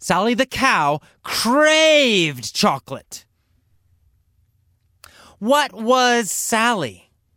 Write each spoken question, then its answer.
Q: What was Sally?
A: She was a cow. Sally was a cow.